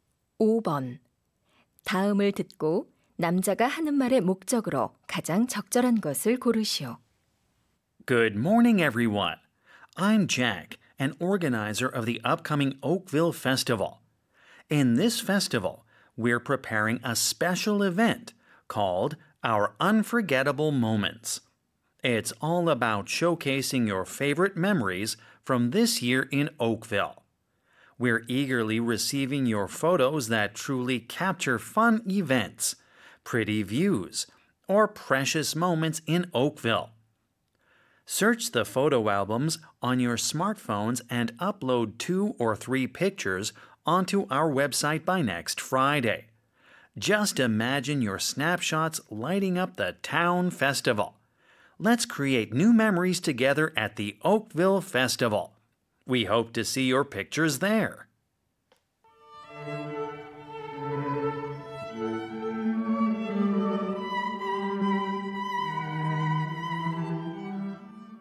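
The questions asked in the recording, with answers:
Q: 다음을 듣고 남자가 하는 말의 목적으로 가장 적절한 것을 고르시오.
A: 축제 행사를 위해 올해 오크빌에서의 추억이 담긴 사진 업로드를 요청하려고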